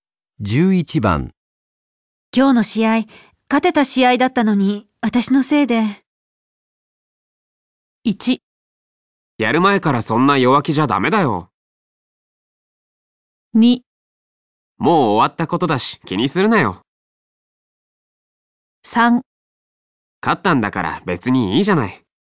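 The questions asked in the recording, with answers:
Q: 今日の試合、勝てた試合だったのに、私のせいで。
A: 2: もう終わったことだし気にするなよ。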